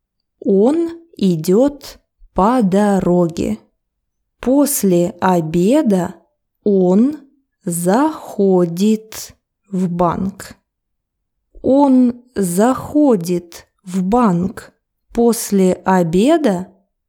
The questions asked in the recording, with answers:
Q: Он заходит в банк после обеда?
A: Да, он заходит в банк после обеда.